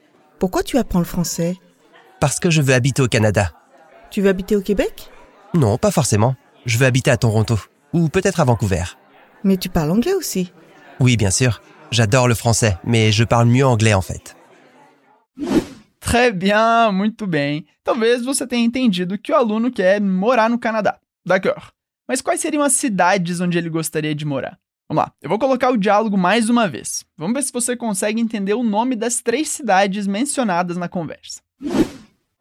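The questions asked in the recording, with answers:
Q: Mas quais seriam as cidades onde ele gostaria de morar?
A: Toronto ou talvez Vancouver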